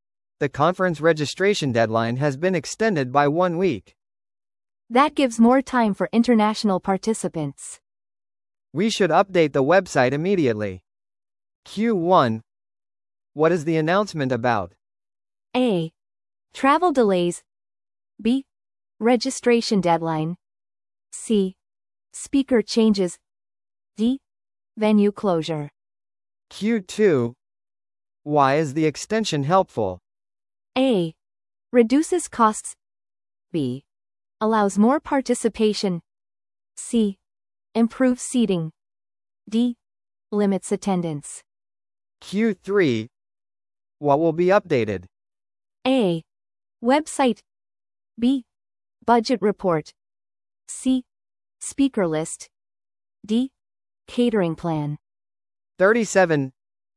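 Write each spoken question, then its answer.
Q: What is the announcement about?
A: B: Registration deadline.

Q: Why is the extension helpful?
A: B: Allows more participation.

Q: What will be updated?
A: A: Website.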